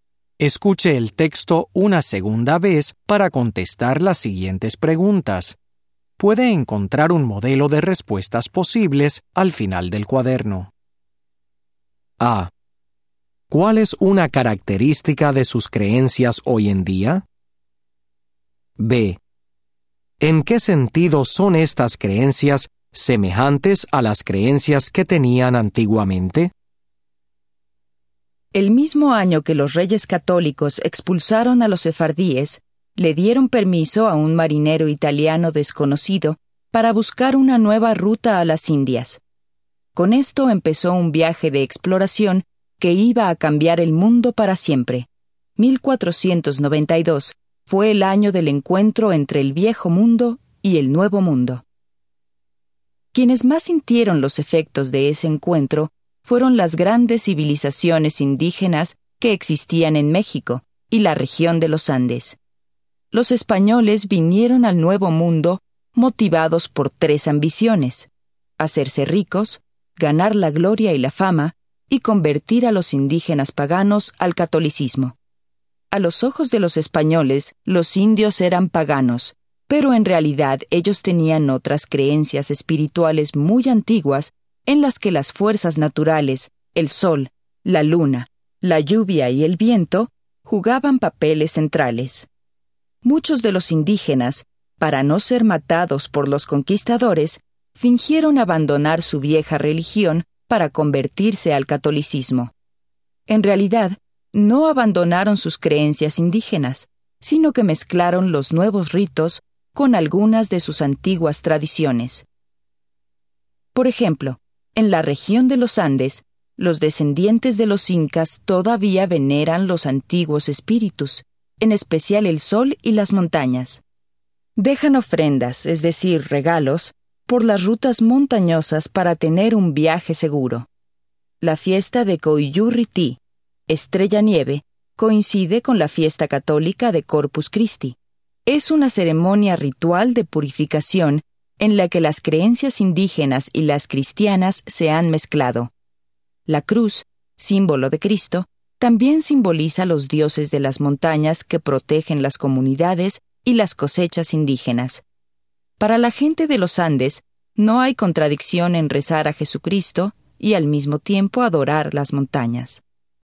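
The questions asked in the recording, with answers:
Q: ¿Cuál es una característica de sus creencias hoy en día?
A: Mezclan las creencias indígenas con las cristianas (católicas)

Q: ¿En qué sentido son estas creencias semejantes a las creencias que tenían antiguamente?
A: Todavía veneran las fuerzas naturales y los antiguos espíritus, en especial el sol y las montañas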